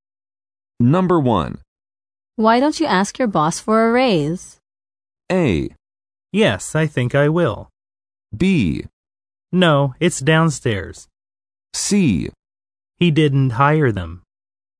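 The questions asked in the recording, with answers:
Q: Why don't you ask your boss for a raise?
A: A: Yes, I think I will.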